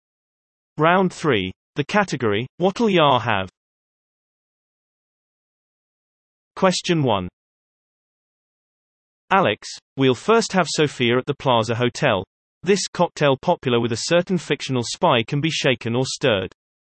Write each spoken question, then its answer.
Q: This cocktail popular with a certain fictional spy can be shaken or stirred.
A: Answer martini.